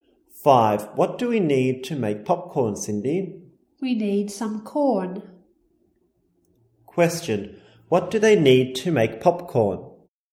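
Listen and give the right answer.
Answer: Some corn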